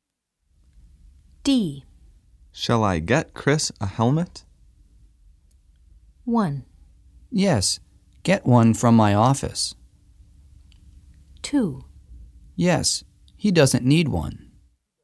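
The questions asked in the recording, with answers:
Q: Shall I get Chris a helmet?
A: 1: Yes, get one from my office.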